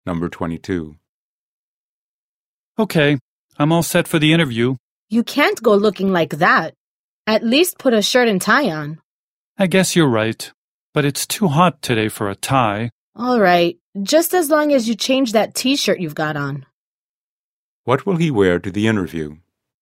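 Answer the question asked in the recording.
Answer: A shirt, without a tie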